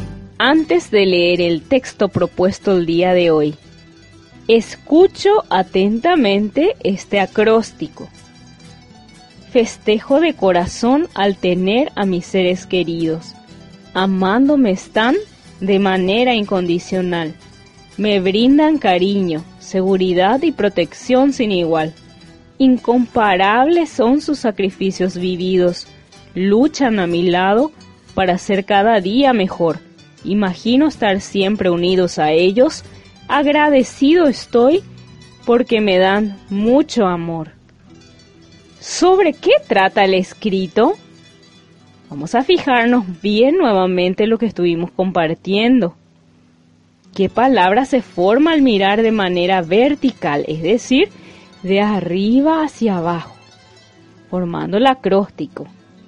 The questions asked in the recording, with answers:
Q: ¿Qué palabra se forma al mirar de manera vertical, es decir, de arriba hacia abajo, formando el acróstico?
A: Muy bien, de la palabra familia.